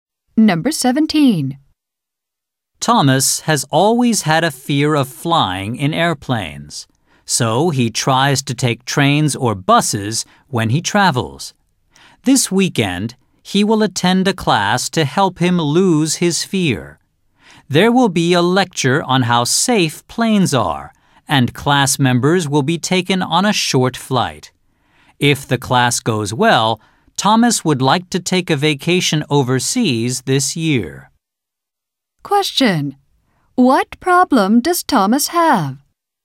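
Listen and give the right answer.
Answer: He is afraid of flying in airplanes.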